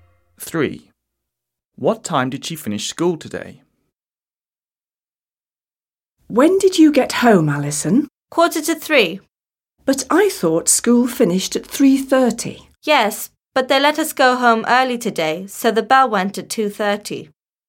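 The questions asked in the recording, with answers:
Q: What time did she finish school today?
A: 2:30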